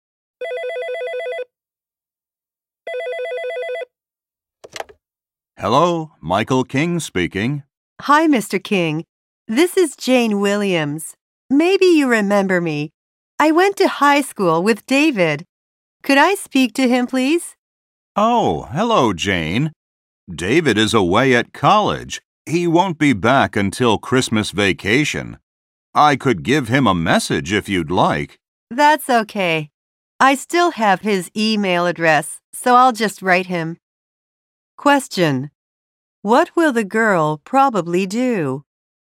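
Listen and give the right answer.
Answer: Send David an email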